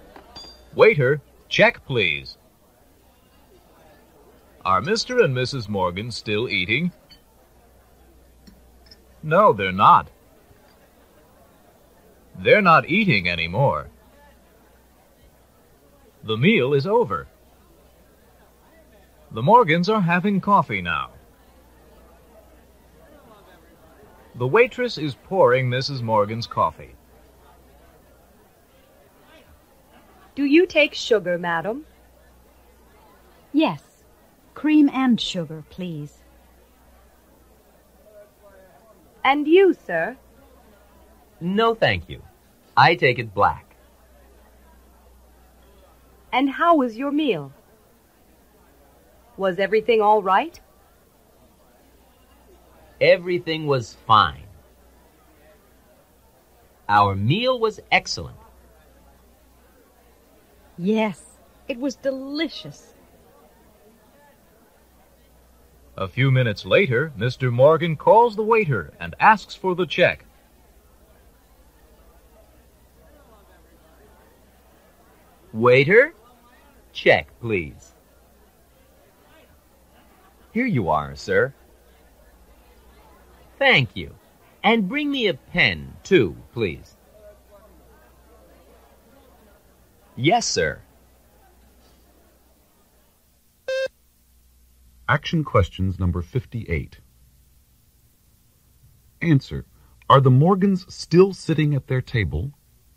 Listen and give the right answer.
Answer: Yes, they are.